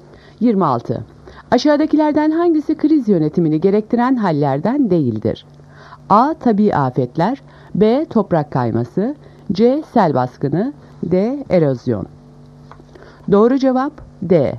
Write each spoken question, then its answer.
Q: Aşağıdakilerden hangisi kriz yönetimini gerektiren hallerden değildir?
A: Doğru cevap D. Erozyon.